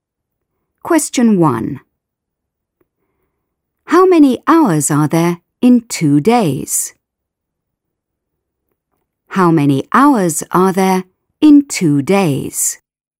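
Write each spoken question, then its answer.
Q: How many hours are there in 2 days?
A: 48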